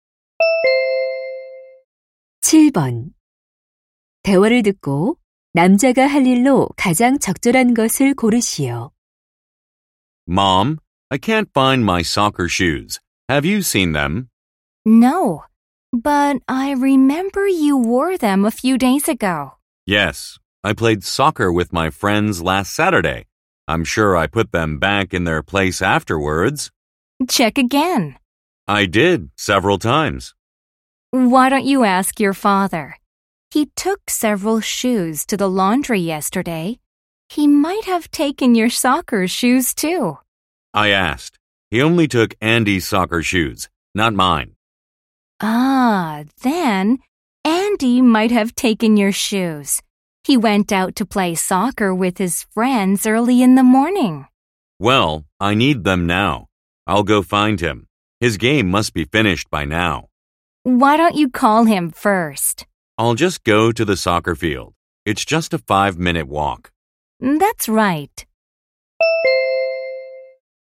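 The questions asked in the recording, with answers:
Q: 대화를 듣고 남자가 할 일로 가장 적절한 것을 고르시오.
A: 축구장에 가서 Andy 찾기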